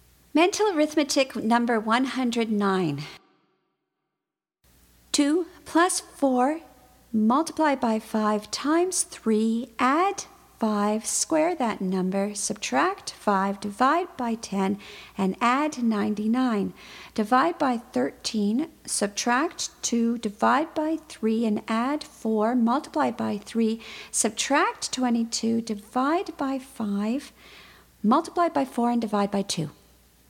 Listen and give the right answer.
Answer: And the answer is 26.